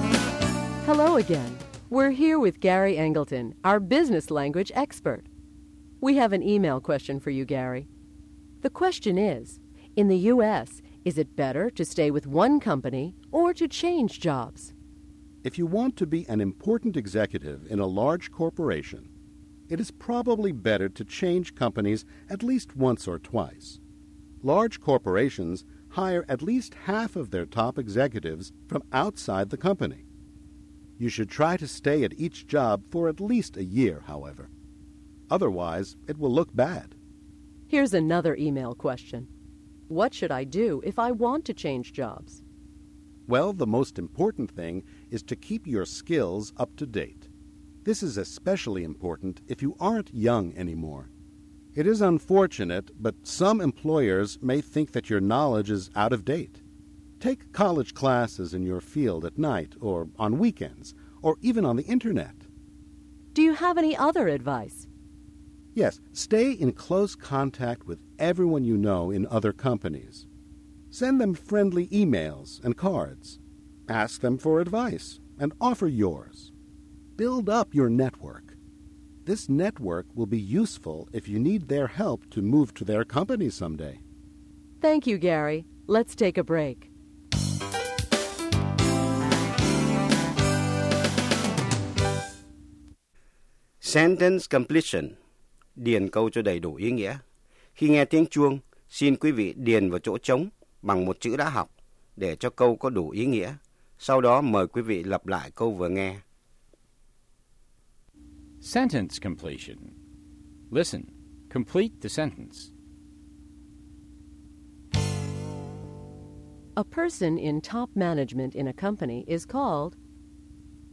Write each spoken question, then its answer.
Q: A person in top management in a company is called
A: an executive. The person is called an executive.